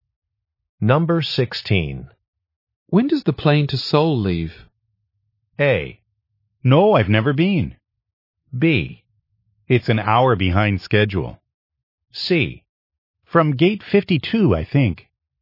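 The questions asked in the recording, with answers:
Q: When does the plane to Seoul leave?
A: B: It's an hour behind schedule.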